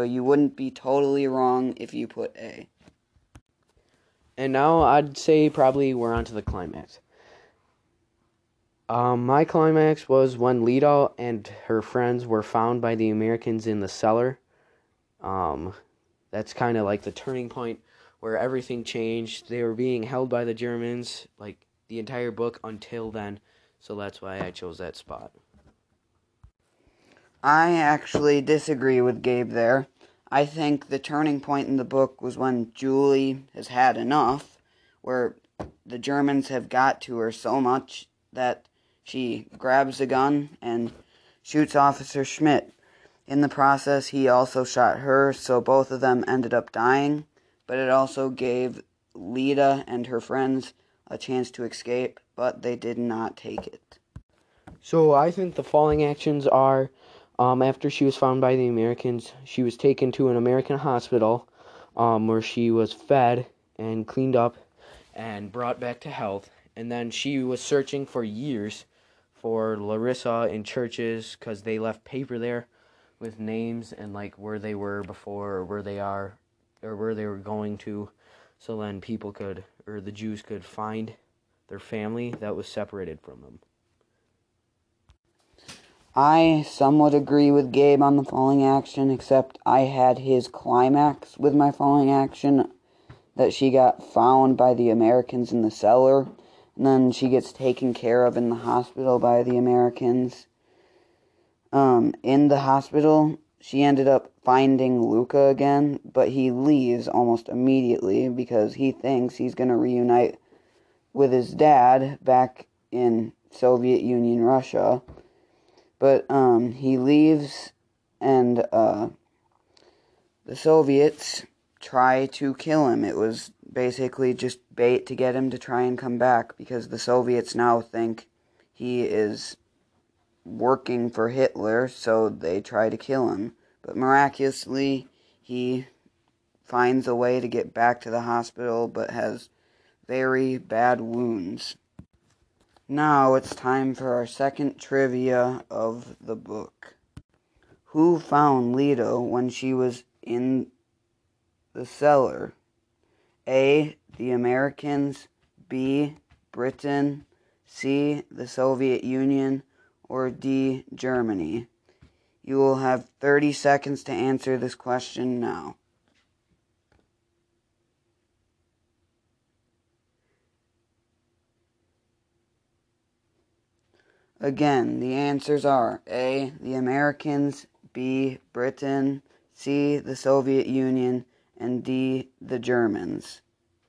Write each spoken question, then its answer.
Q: Who found Lita when she was in the cellar?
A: If you picked the Americans, you would be correct.